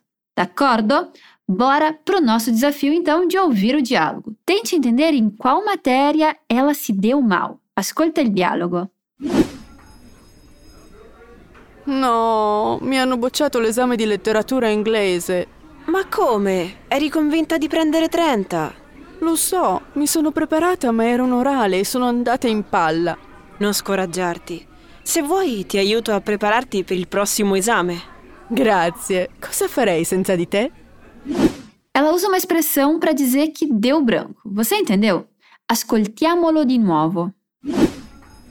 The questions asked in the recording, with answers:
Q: Tente entender em qual matéria ela se deu mal.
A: Ou seja, não, me reprovaram na prova de literatura inglesa.

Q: Ela usa uma expressão para dizer que deu branco.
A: Sono andata in palla.